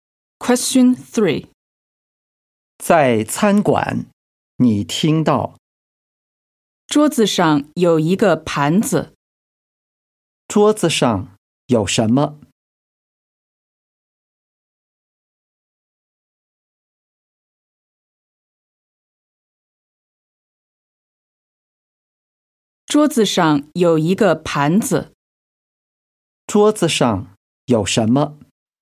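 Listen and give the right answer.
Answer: 一个盘子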